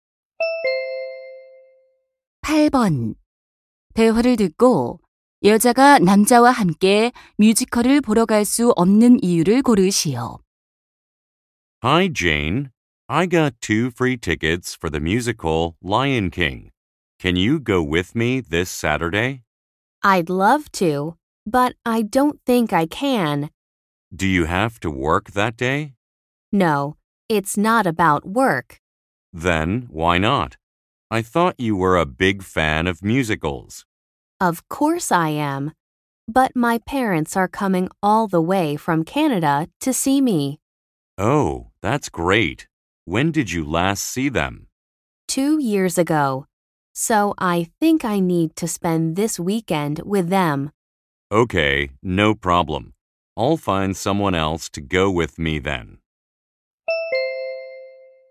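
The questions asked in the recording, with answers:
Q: 대화를 듣고 여자가 남자와 함께 뮤지컬을 보러 갈 수 없는 이유를 고르시오.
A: 캐나다에서 오시는 부모님과 주말을 보내야 해서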